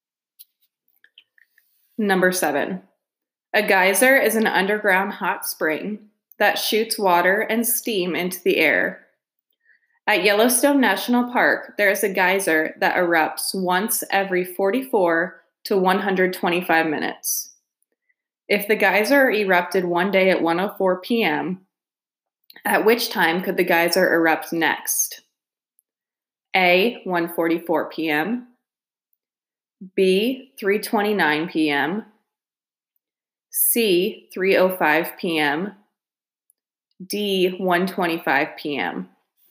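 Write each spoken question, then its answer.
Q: If the geyser erupted one day at 1:04 p.m., at which time could the geyser erupt next?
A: C: 3:05 p.m.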